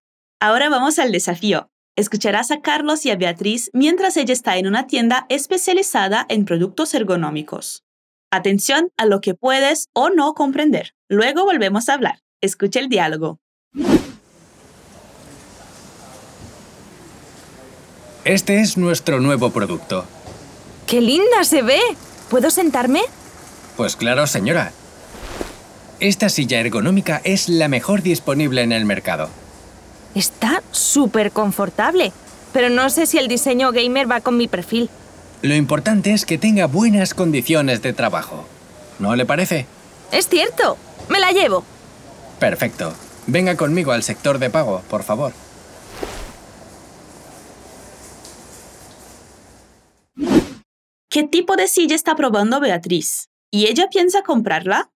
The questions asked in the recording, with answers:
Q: ¿Qué tipo de silla está probando Beatriz?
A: Bea fue a la tienda de sillas y está probando una ergonómica que es la mejor del mercado.

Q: ¿Y ella piensa comprarla?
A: Beatriz dice que llevará la silla.